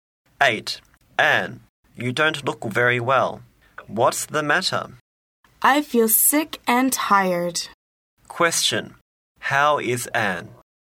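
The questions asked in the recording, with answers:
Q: How is Anne?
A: She feels sick and tired.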